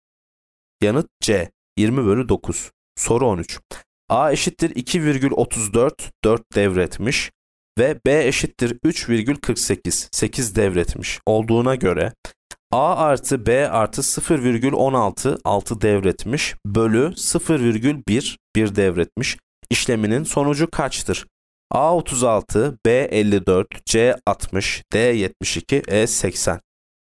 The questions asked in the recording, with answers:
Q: A eşittir 2,34, 4 devretmiş ve B eşittir 3,48, 8 devretmiş olduğuna göre A artı B artı 0,16, 6 devretmiş bölü 0,1, 1 devretmiş işleminin sonucu kaçtır?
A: Yanıt B 54.